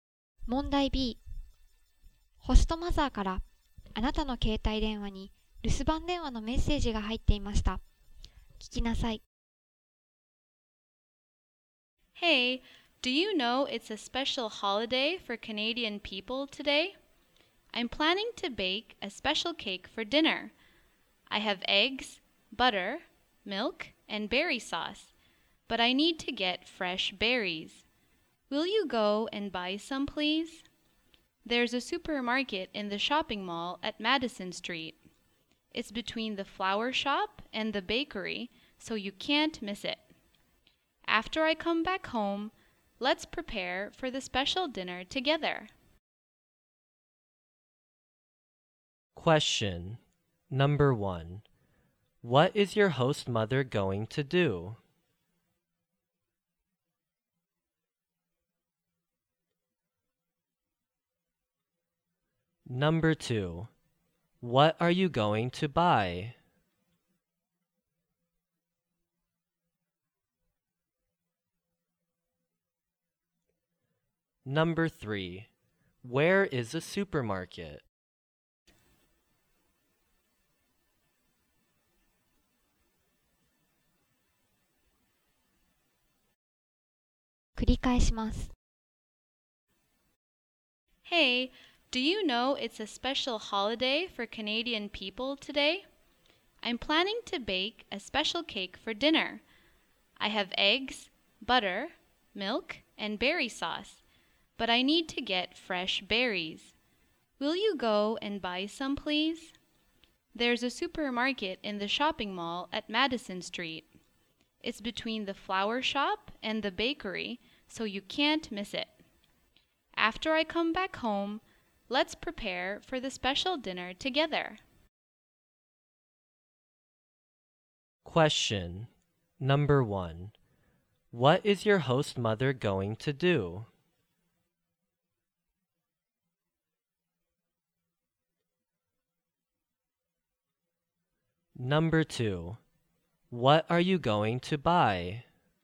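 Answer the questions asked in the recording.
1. Bake a special cake for dinner
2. Fresh berries
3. In the shopping mall on Madison Street, between the flower shop and the bakery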